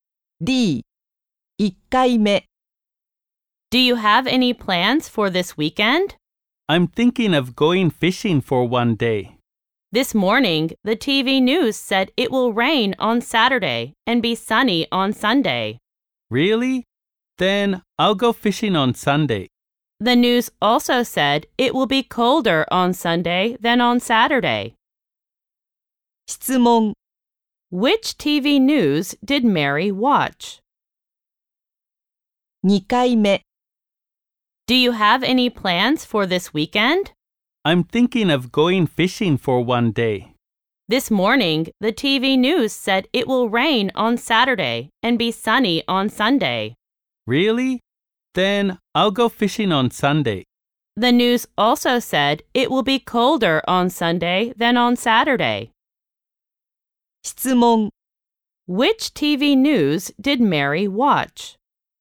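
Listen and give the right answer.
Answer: Rain on Saturday; sunny and colder on Sunday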